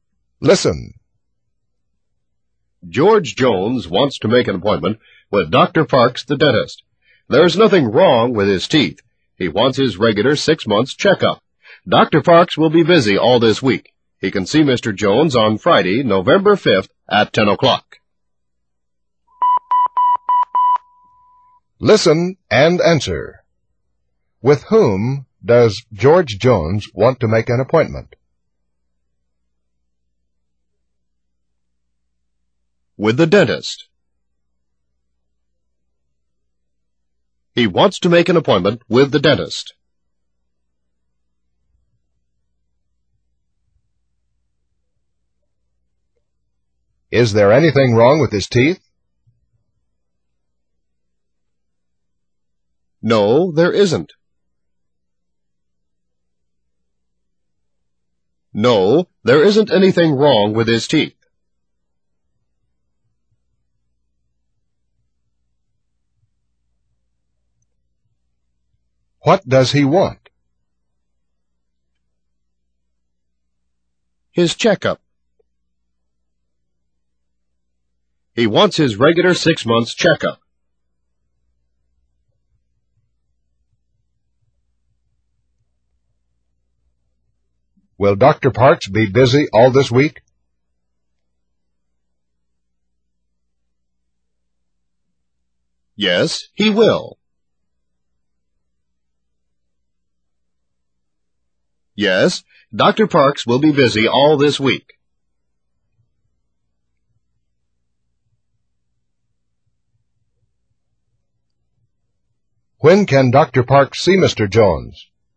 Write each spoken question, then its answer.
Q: With whom does George Jones want to make an appointment?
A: With the dentist.

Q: Is there anything wrong with his teeth?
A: No, there isn't.

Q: What does he want?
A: His checkup.

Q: Will Dr. Parks be busy all this week?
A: Yes, he will.

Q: When can Dr. Parks see Mr.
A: On Friday, November 5th at 10 o'clock.